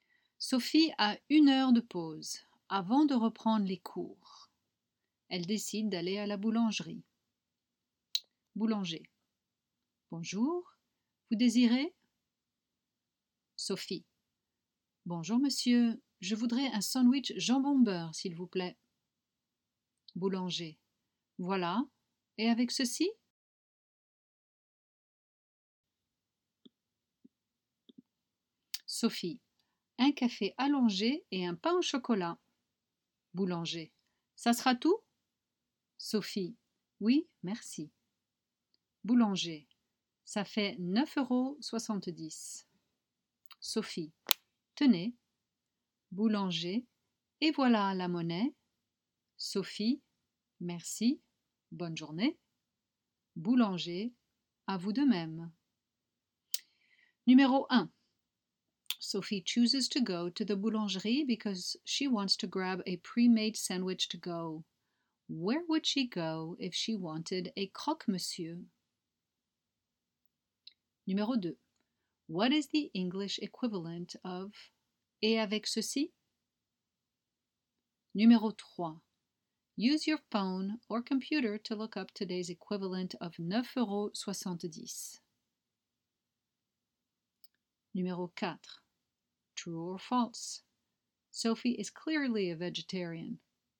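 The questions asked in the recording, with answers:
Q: True or false? Sophie is clearly a vegetarian.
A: False: she orders a ham and butter sandwich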